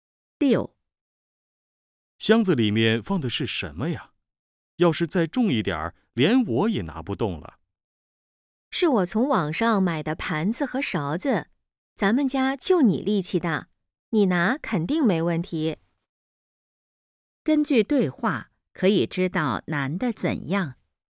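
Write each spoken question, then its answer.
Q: 根据对话,可以知道难的怎样。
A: 力气大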